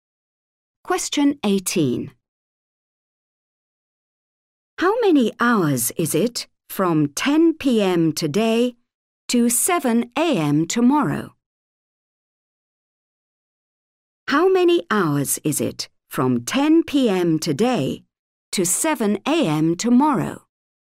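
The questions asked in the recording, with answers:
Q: How many hours is it from 10 p.m. today to 7 a.m. tomorrow?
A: 9 hours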